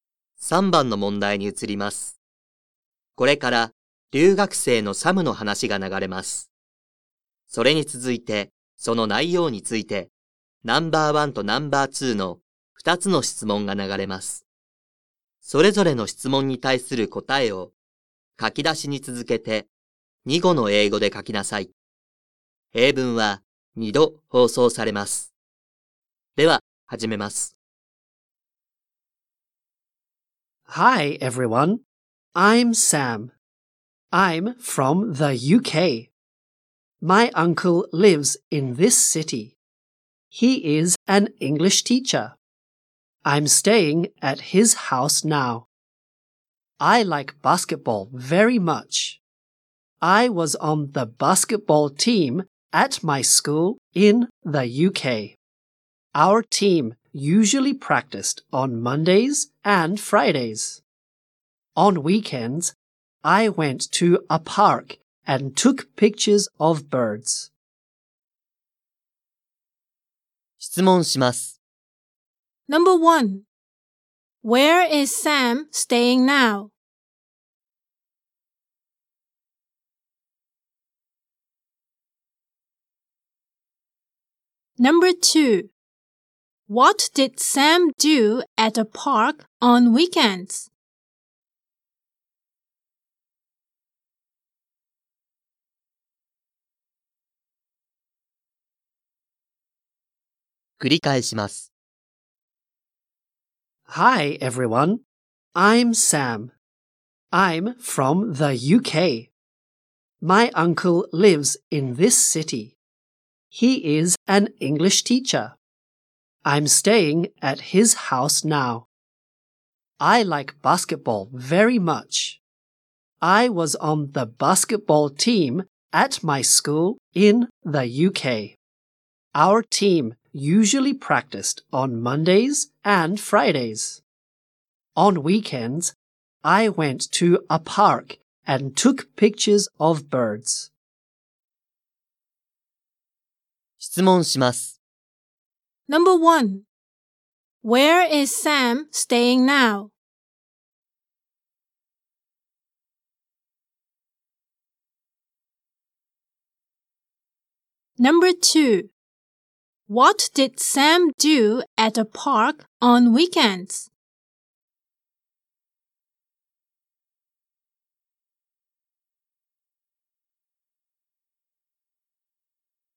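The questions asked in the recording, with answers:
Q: Where is Sam staying now?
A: At his uncle's house.

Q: What did Sam do at a park on weekends?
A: He took pictures of birds.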